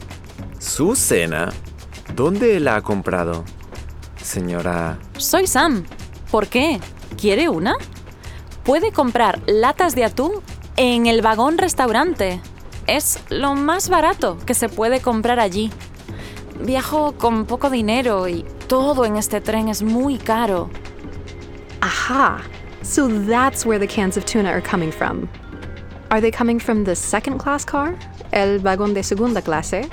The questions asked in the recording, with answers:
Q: Are they coming from the second class car?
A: No, they're coming from el vagón restaurante.